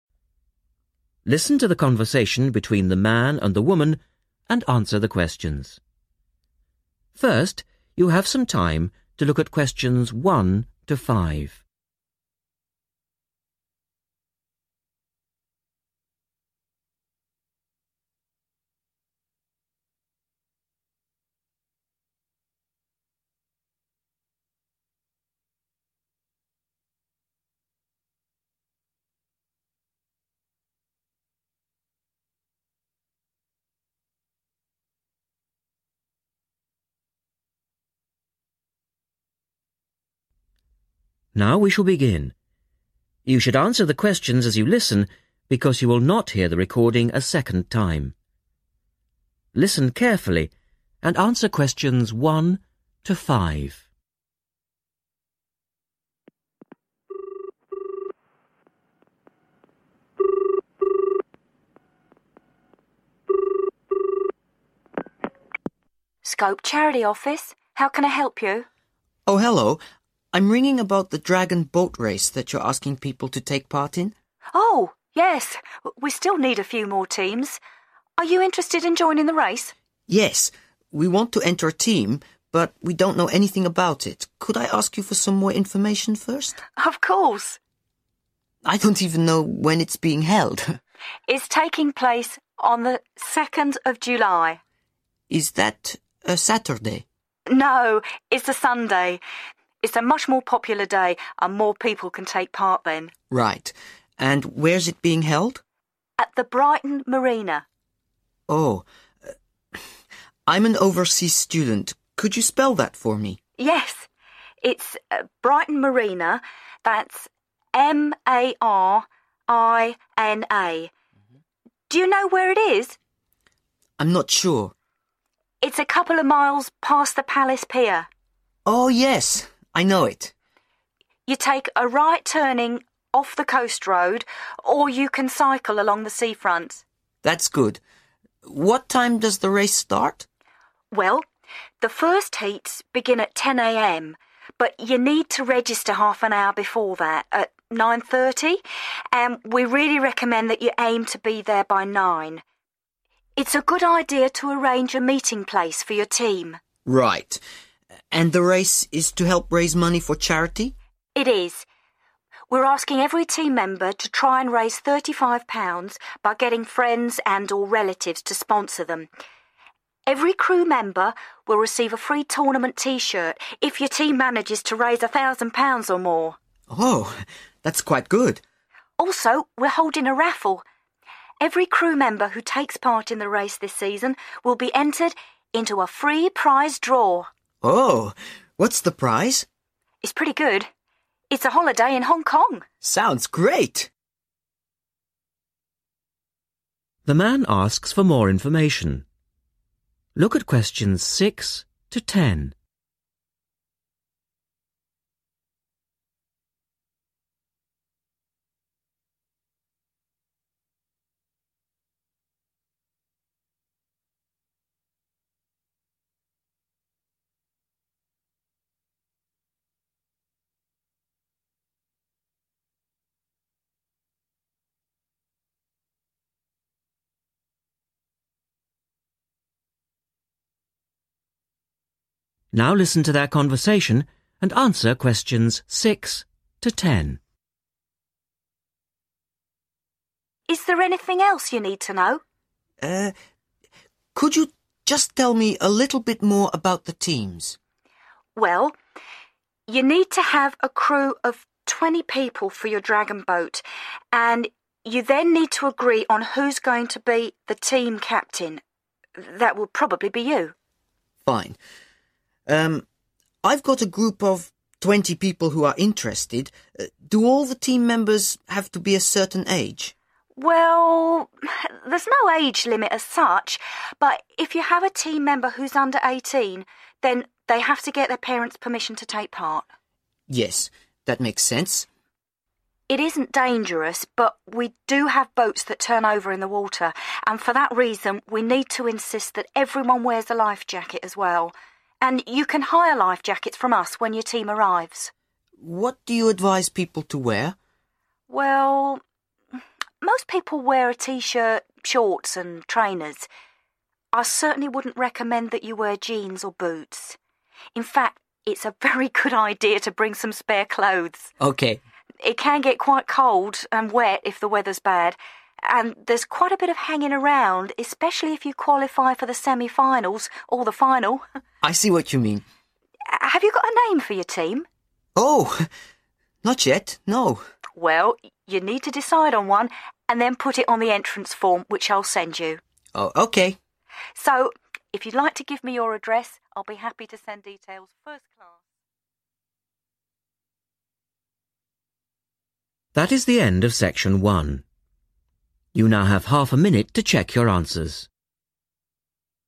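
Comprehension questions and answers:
Write NO MORE THAN THREE WORDS AND/OR A NUMBER for each answer.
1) Day and date: 1.................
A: Sunday 2nd July

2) Place: Brighton 2.....................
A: Marina

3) Registration time: 3.................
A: 9:30

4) Aim to raise over 4............... pounds as a team and get a free t-shirt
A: 1,000

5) Free prize draw for trip to 5..............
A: Hong Kong

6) Must have crew of 20 and elect a 6..............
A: team captain

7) Participants under 18 need to have 7.............. to enter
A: parents' permission

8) Need to hire 8..............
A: life jackets

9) Advised to bring extra 9...............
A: clothes

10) Must choose a 10................. for the team.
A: name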